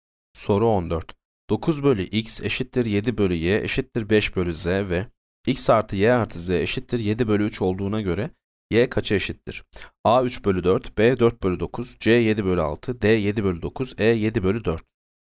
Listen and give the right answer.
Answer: Yanıt D 7 bölü 9.